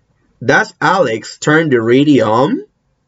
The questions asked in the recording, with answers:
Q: Does Alex turn the radio on?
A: No, Alex doesn't turn the radio on.